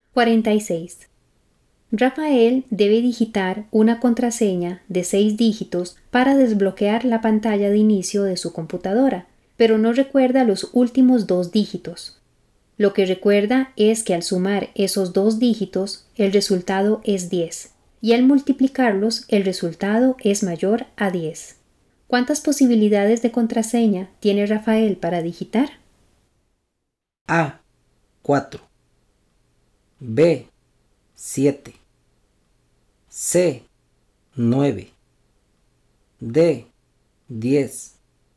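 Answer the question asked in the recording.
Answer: B: 7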